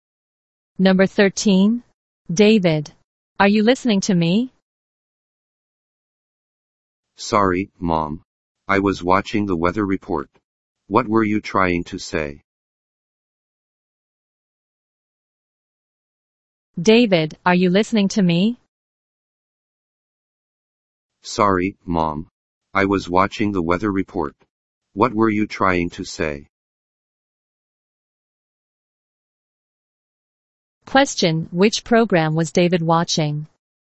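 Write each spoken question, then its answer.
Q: which program was David watching?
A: The weather report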